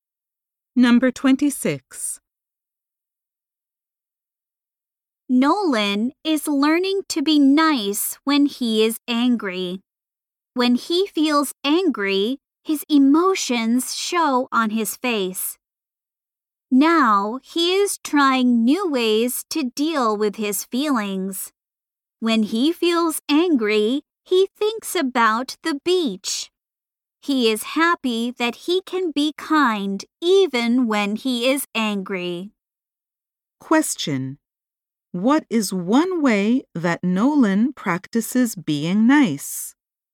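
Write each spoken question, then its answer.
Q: What is one way that Nolan practices being nice?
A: He thinks about the beach when he is angry.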